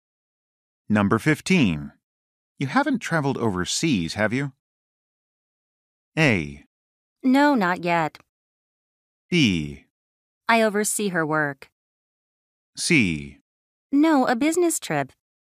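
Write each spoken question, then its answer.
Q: You haven't traveled overseas, have you?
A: A: No, not yet.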